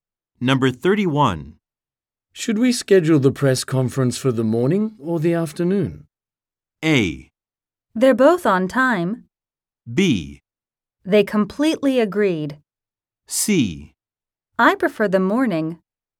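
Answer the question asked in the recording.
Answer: C: I prefer the morning.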